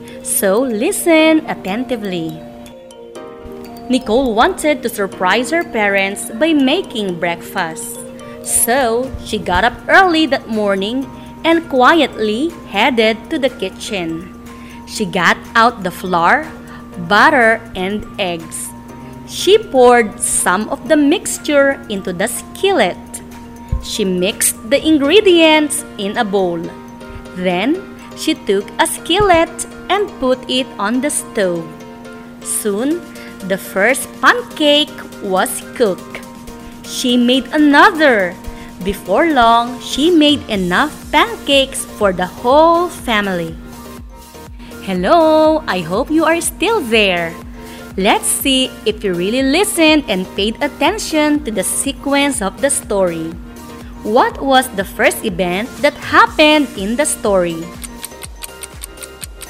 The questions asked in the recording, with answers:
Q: What was the first event that happened in the story?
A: Ma'am, Nicole wanted to surprise her parents by making breakfast.